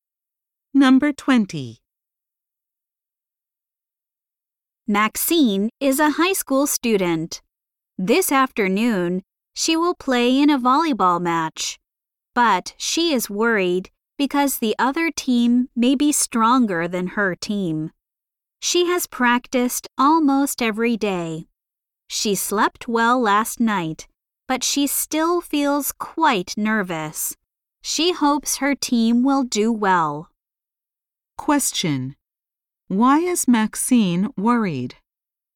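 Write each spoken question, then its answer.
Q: Why is Maxine worried?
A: The other team may be stronger than her team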